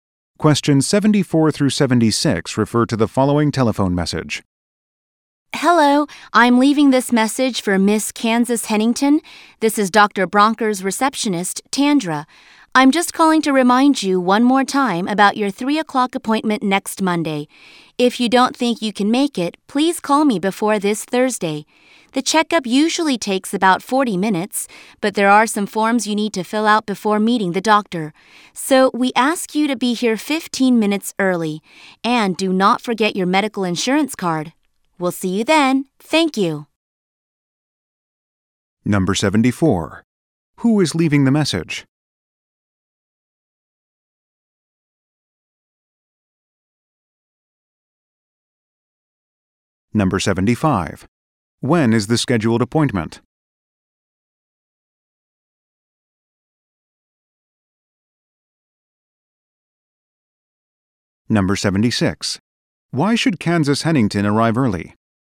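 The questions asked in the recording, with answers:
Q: Who is leaving the message?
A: A doctor's receptionist

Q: When is the scheduled appointment?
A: Next Monday at 3 o'clock

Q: Why should Kansas Hennington arrive early?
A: To fill out some forms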